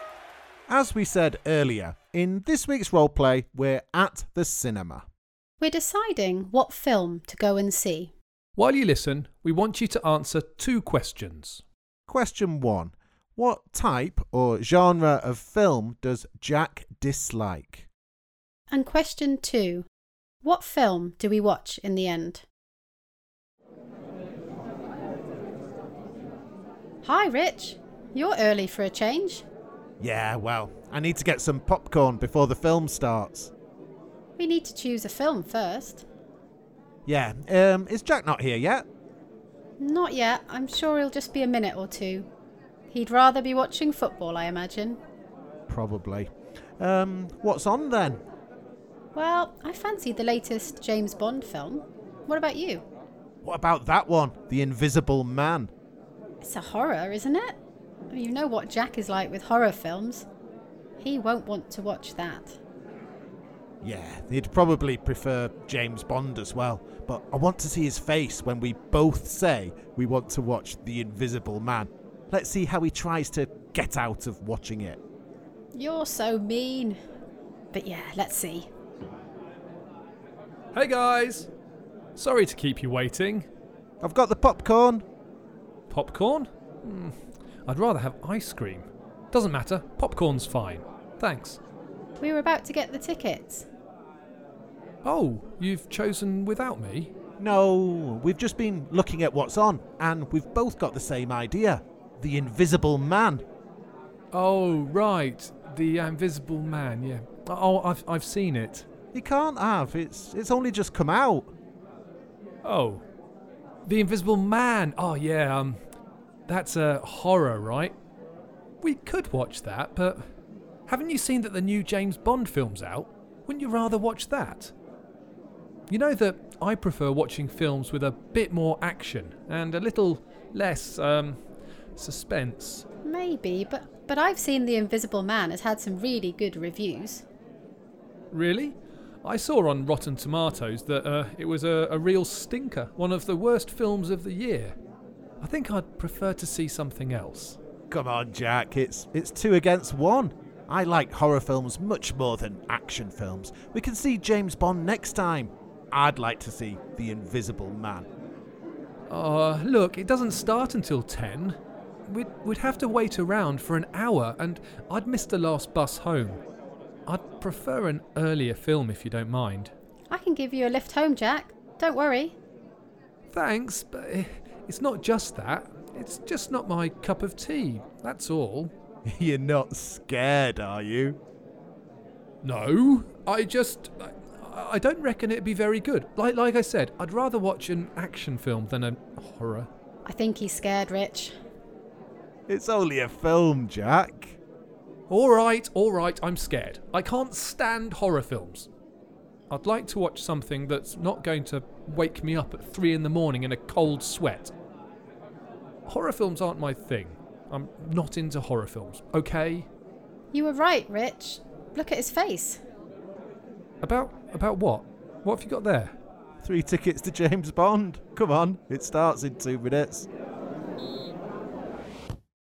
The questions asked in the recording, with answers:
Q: What type or genre of film does Jack dislike?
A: The answer, as I'm sure you know, is horror films.

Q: What film do we watch in the end?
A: The answer is James Bond